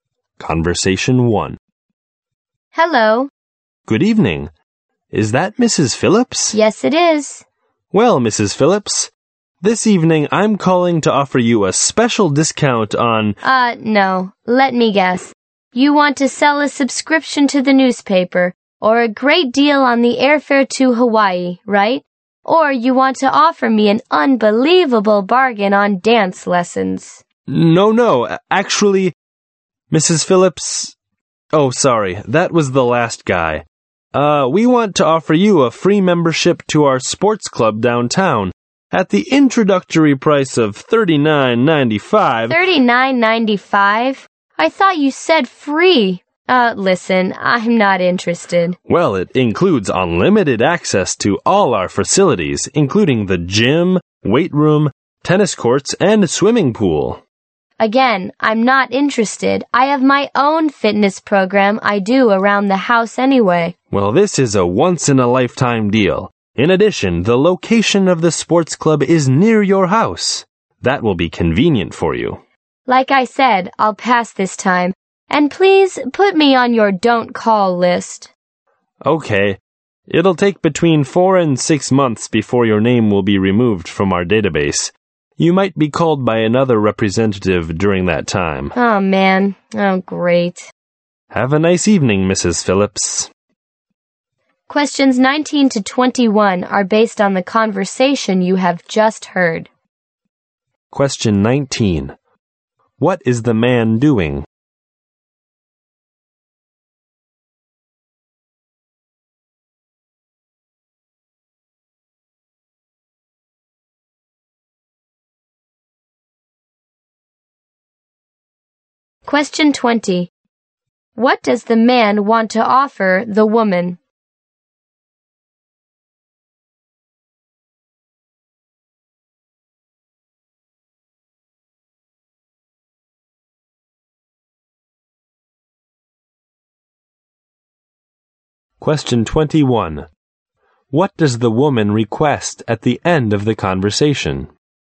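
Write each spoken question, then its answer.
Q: What is the man doing?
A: Making a sales call to sell a sports club membership.

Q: What does the man want to offer the woman?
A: A sports club membership at an introductory price of $39.95.

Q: What does the woman request at the end of the conversation?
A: To be put on their don't-call list.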